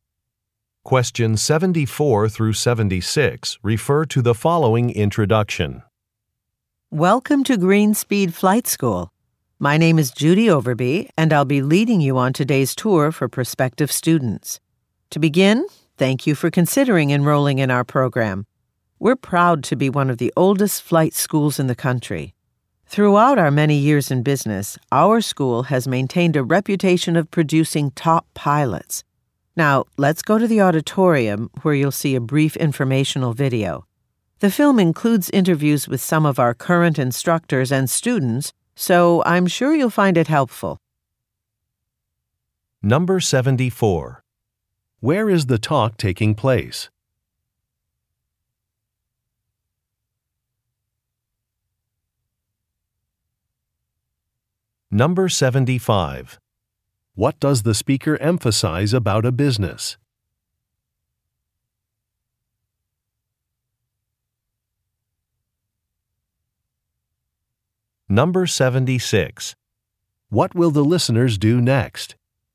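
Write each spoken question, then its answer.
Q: Where is the talk taking place?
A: At a flight school

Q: What does the speaker emphasize about a business?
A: Its long history and reputation for top pilots

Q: What will the listeners do next?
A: Watch a video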